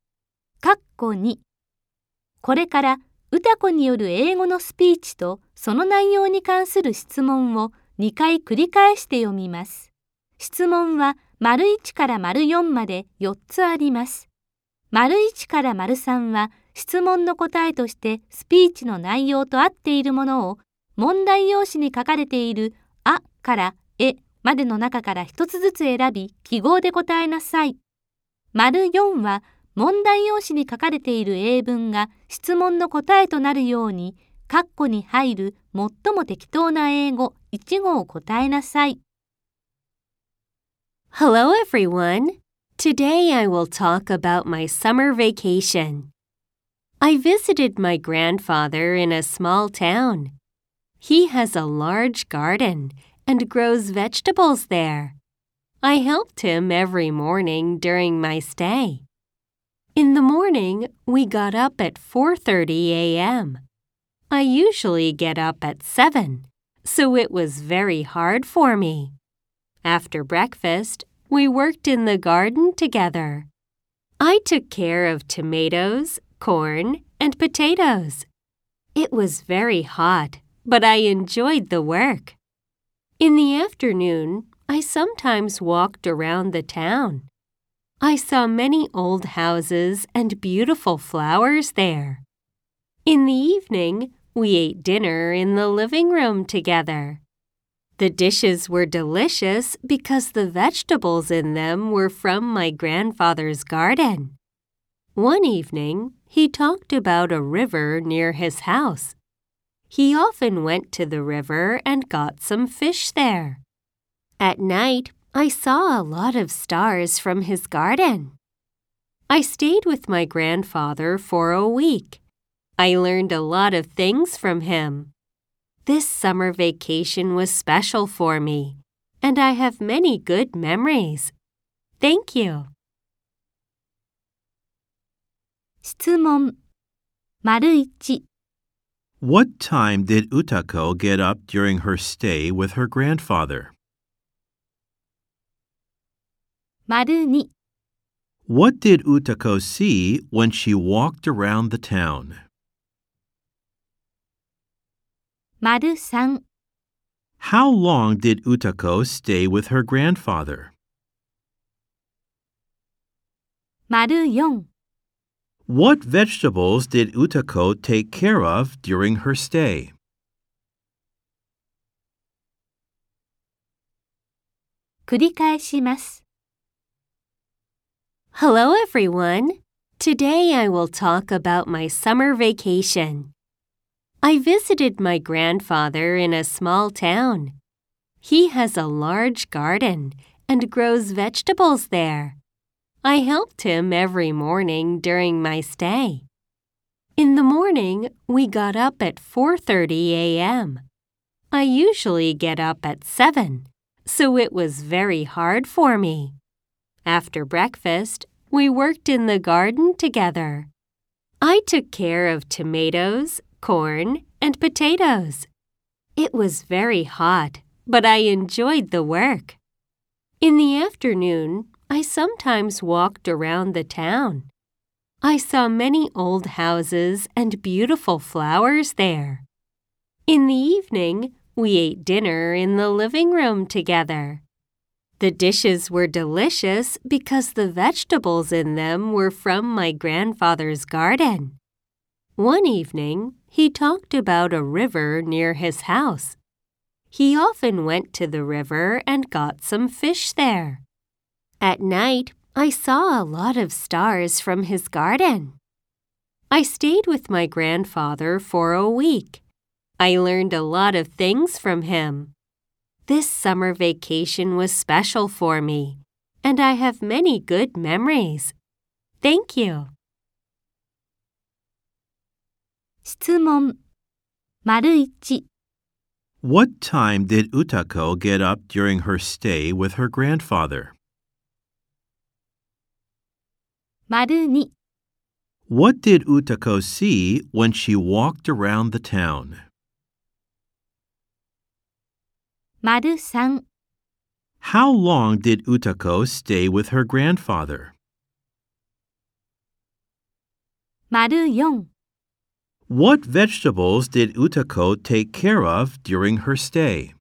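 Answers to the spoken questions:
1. At 4:30 a.m.
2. Many old houses and beautiful flowers
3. For a week
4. Tomatoes, corn, and potatoes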